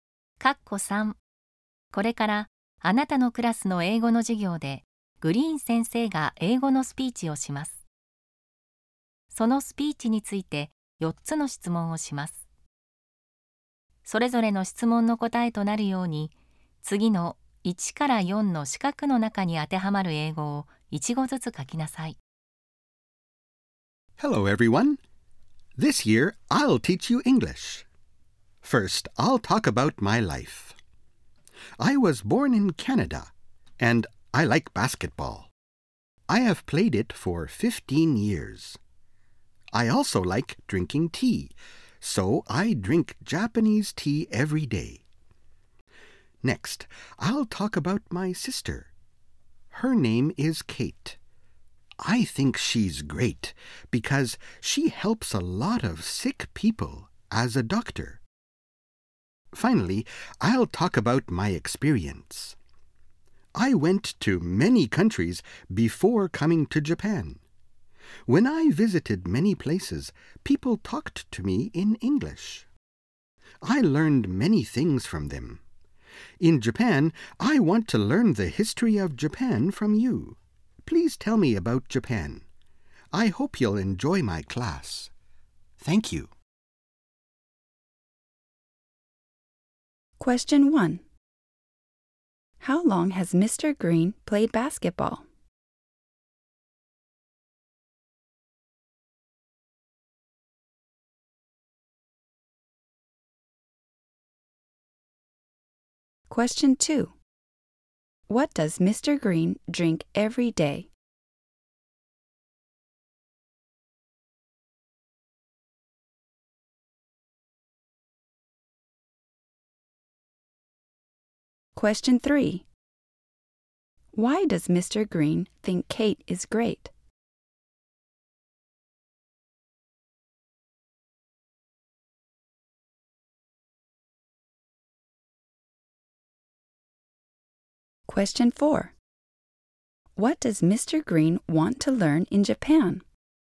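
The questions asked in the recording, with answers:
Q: How long has Mr. Green played basketball?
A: For 15 years

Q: What does Mr. Green drink every day?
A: Japanese tea

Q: Why does Mr. Green think Kate is great?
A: Because she helps a lot of sick people as a doctor

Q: What does Mr. Green want to learn in Japan?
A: The history of Japan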